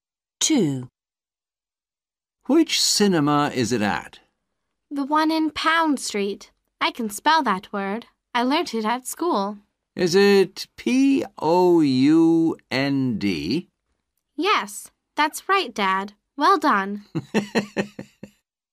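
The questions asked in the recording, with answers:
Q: Which cinema is it at?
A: the one in Pound Street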